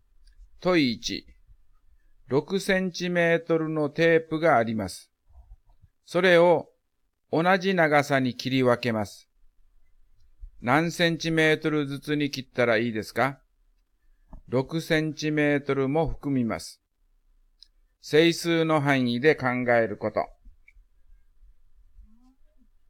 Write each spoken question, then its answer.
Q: 何センチメートルずつに切ったらいいですか?6センチメートルも含みます。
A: 1、2、3、6が括弧に入ります